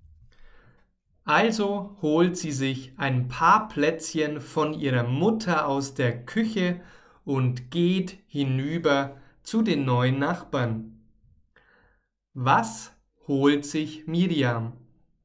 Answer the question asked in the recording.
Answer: Sie holt sich ein paar Plätzchen.